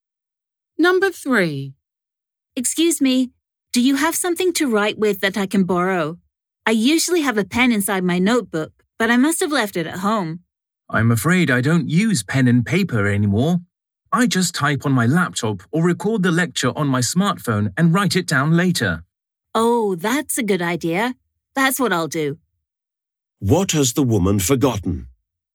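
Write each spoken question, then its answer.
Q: What has the woman forgotten?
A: Her pen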